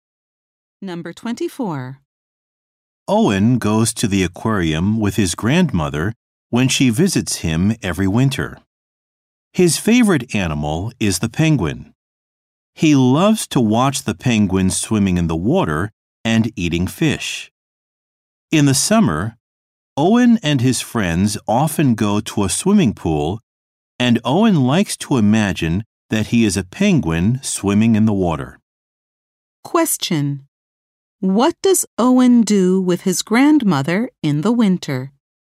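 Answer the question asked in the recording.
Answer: He goes to the aquarium.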